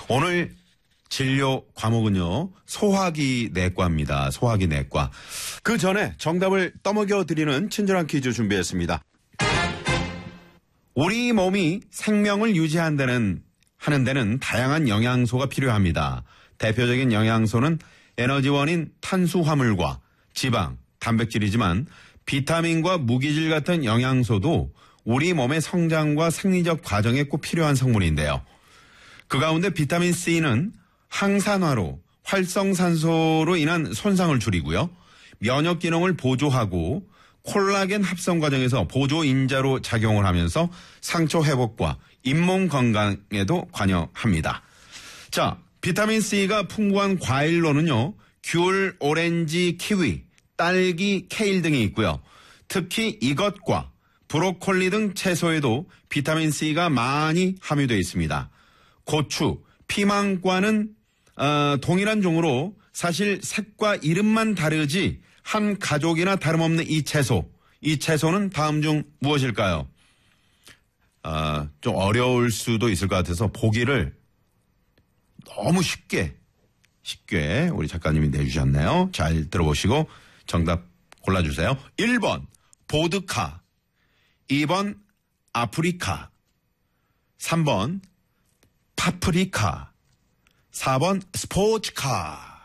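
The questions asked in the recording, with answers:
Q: 이 채소는 다음 중 무엇일까요?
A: 3: 파프리카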